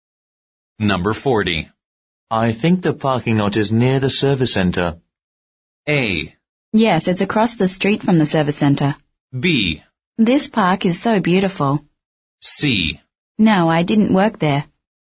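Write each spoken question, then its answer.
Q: I think the parking lot is near the service center.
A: A: Yes, it's across the street from the service center.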